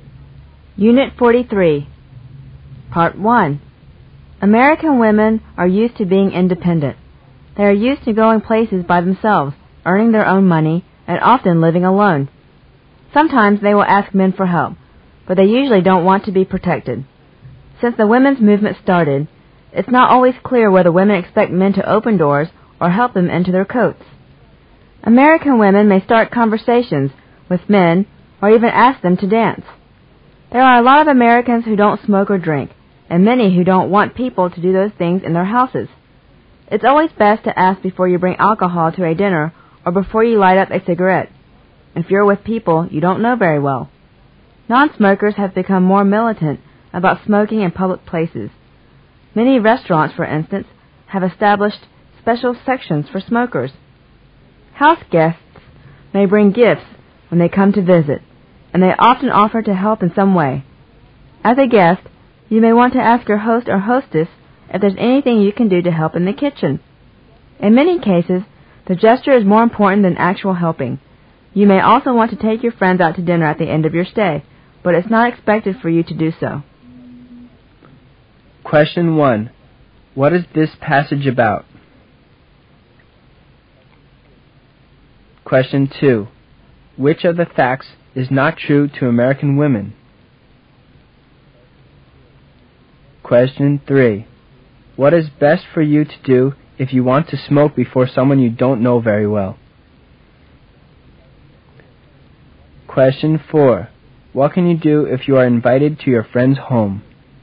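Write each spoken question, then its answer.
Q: What is this passage about?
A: American customs and manners

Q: What is best for you to do if you want to smoke before someone you don't know very well?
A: Ask first

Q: What can you do if you are invited to your friend's home?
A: Bring a gift and offer to help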